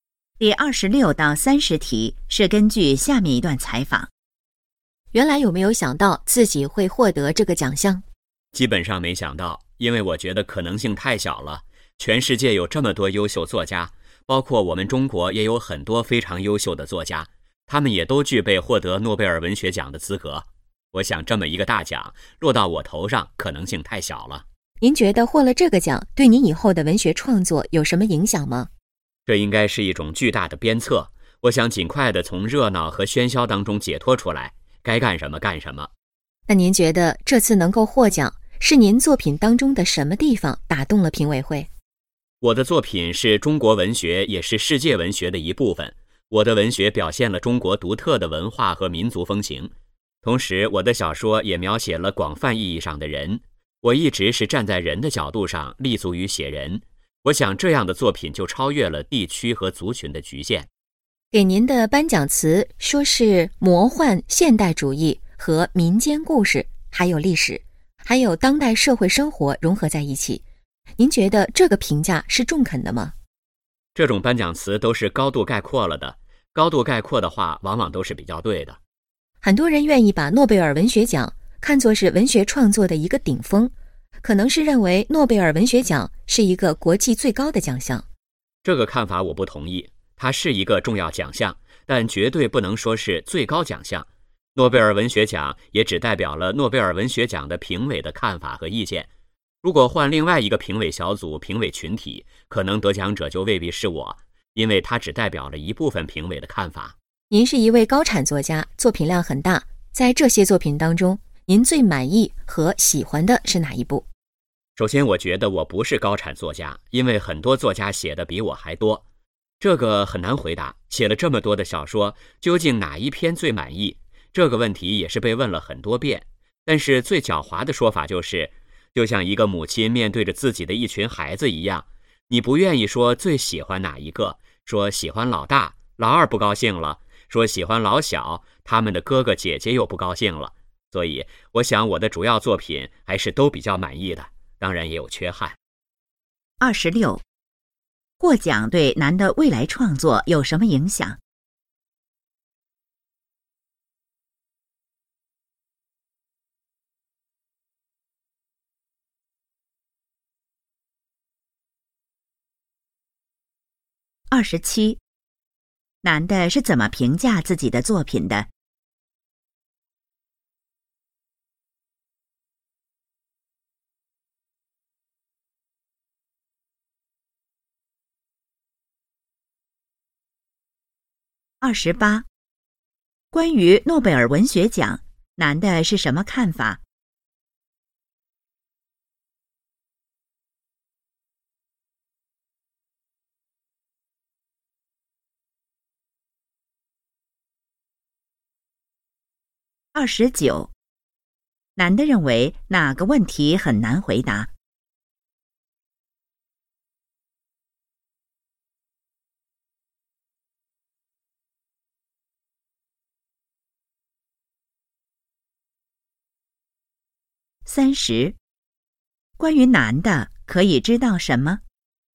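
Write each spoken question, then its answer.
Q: 获奖对男的未来创作有什么影响?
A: 是一种巨大的鞭策

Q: 男的是怎么评价自己的作品的?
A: 主要作品都比较满意,但也有缺憾

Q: 关于诺贝尔文学奖,男的是什么看法?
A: 是重要奖项,但不是最高奖项

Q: 男的认为哪个问题很难回答。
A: 最满意哪一部作品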